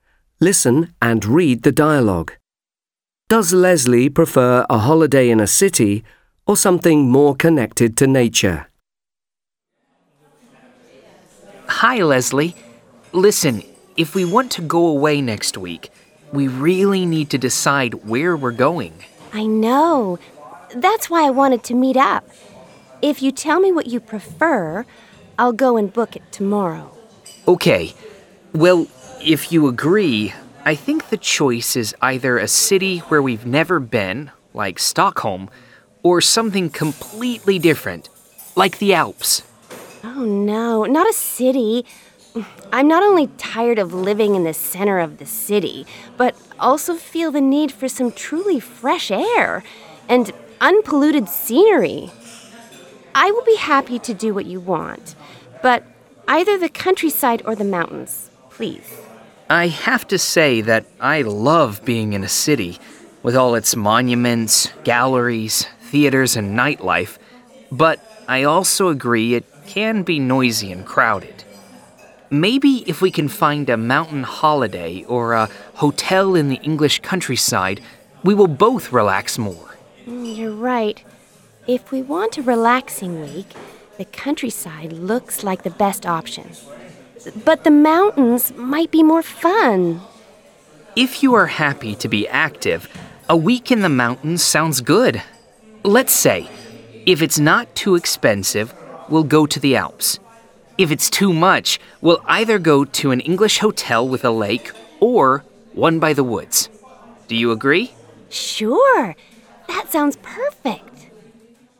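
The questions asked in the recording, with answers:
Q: Does Leslie prefer a holiday in a city or something more connected to nature?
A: Something connected to nature (the countryside or the mountains)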